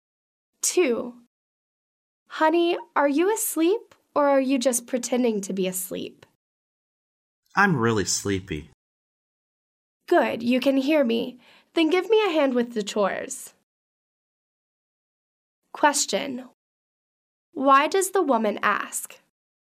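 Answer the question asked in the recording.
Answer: She wants him to help with the chores.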